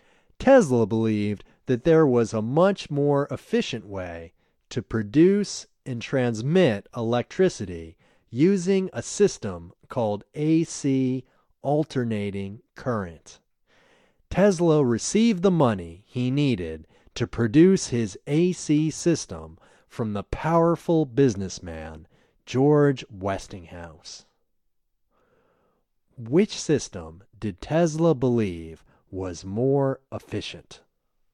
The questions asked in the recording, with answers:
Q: Which system did Tesla believe was more efficient?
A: Tesla believed that AC was more efficient.